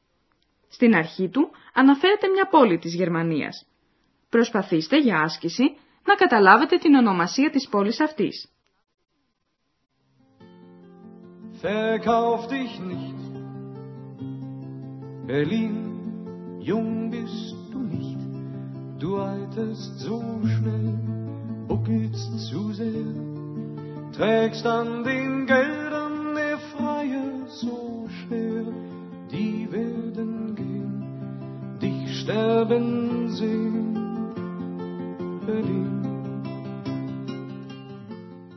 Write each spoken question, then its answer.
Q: Προσπαθήστε για άσκηση να καταλάβετε την ονομασία της πόλης αυτής.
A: Berlin. Berlin.